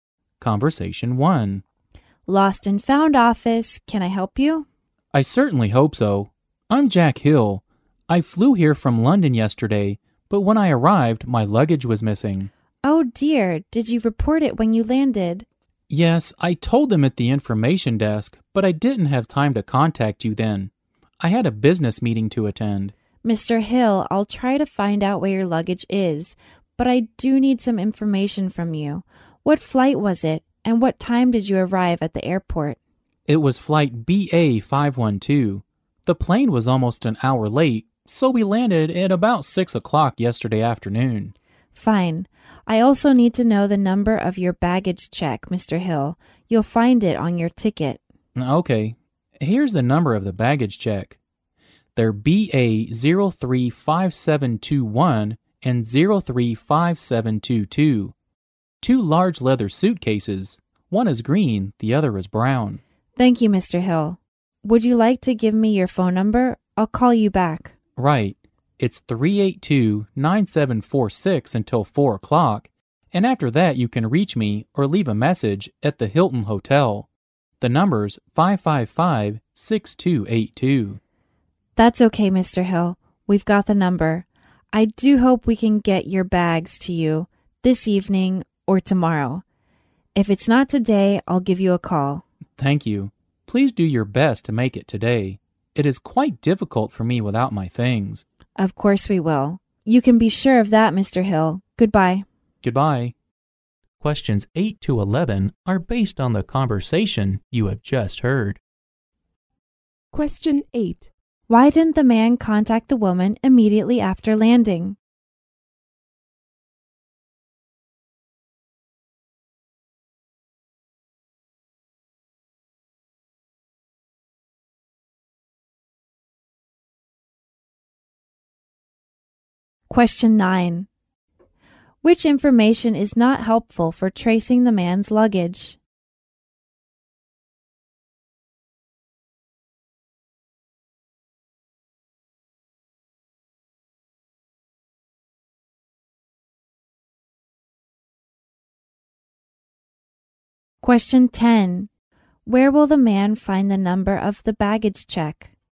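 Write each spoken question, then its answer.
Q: Why didn't the man contact the woman immediately after landing?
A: He had a business meeting to attend.

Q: Where will the man find the number of the baggage check?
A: On his ticket.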